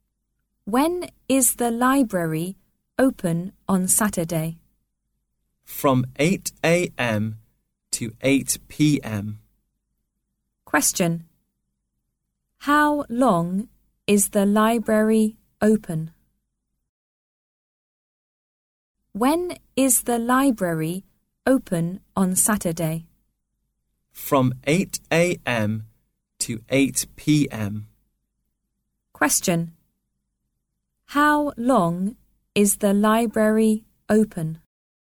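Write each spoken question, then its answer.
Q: How long is the library open?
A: 12 hours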